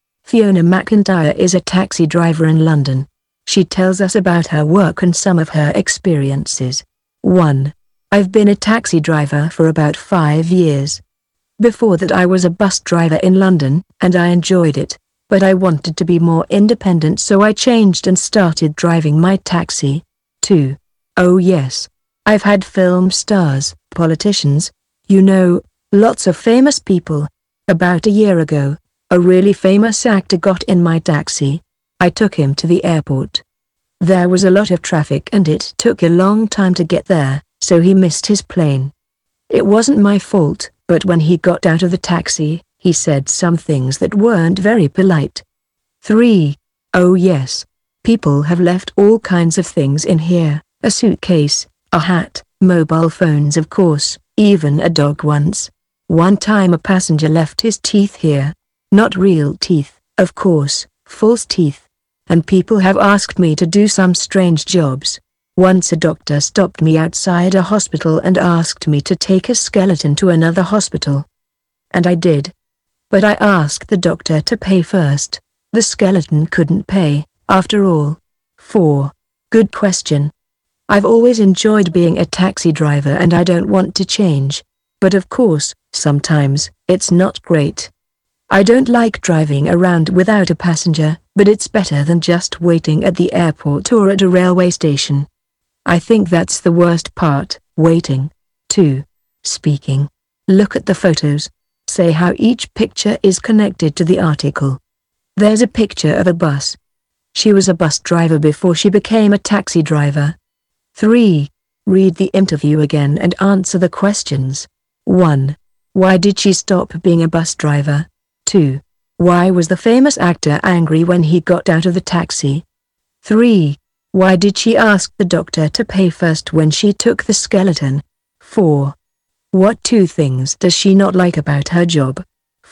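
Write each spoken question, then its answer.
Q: Why did she stop being a bus driver?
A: She wanted to be more independent.

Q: Why was the famous actor angry when he got out of the taxi?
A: Because there was a lot of traffic and he missed his plane.

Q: Why did she ask the doctor to pay first when she took the skeleton?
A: Because the skeleton couldn't pay.

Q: What two things does she not like about her job?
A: Driving around without a passenger and waiting at the airport or railway station.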